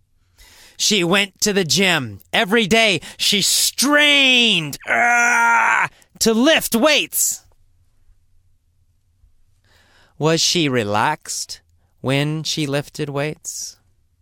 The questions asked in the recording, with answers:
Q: Was she relaxed when she lifted weights?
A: No, she was not relaxed.